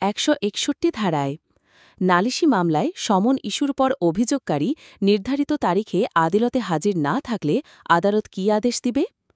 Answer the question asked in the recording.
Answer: আসামিকে খালাস দিবে।